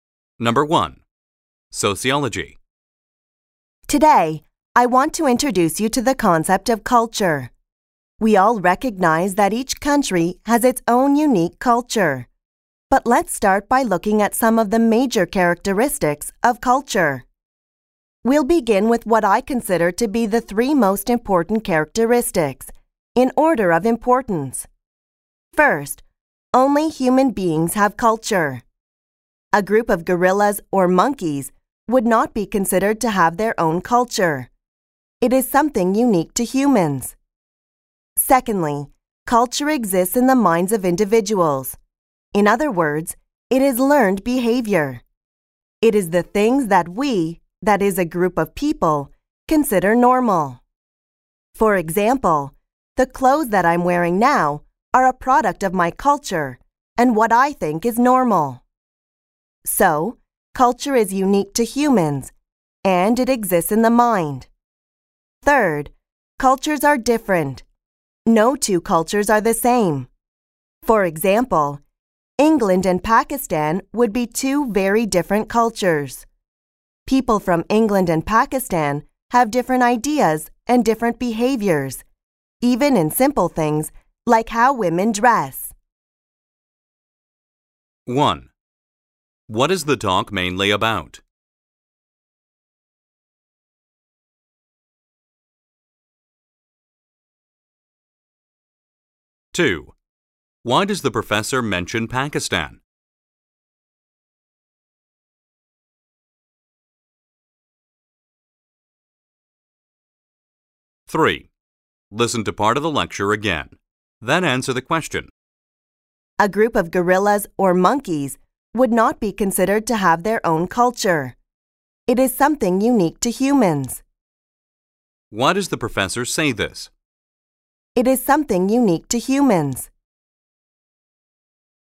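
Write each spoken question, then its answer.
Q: What is the talk mainly about?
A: The major characteristics of culture

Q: Why does the professor mention Pakistan?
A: To give an example showing that cultures are different from each other

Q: Why does the professor say this?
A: To show that only human beings have culture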